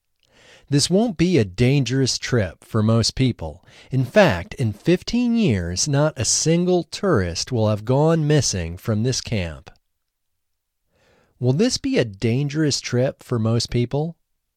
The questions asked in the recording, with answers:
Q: Will this be a dangerous trip for most people?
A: No, this won't be a dangerous trip for most people.